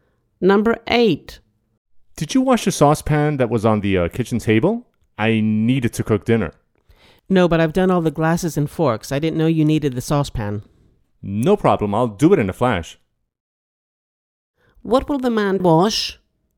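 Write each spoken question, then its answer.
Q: What will the man wash?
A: The saucepan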